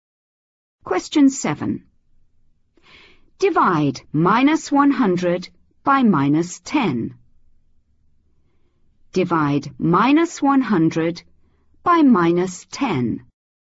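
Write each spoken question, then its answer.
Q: Divide -100 by -10.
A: 10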